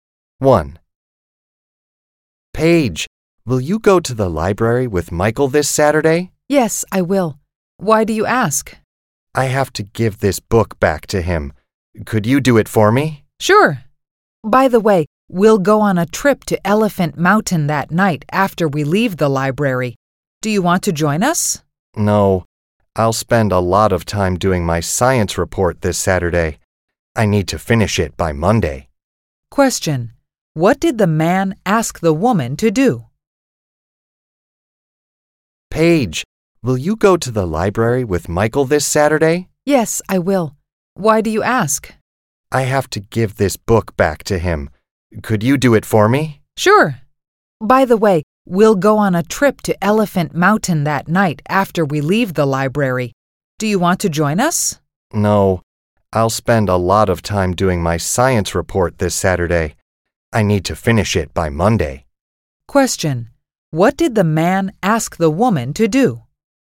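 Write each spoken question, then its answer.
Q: What did the man ask the woman to do?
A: Give the book back to Michael for him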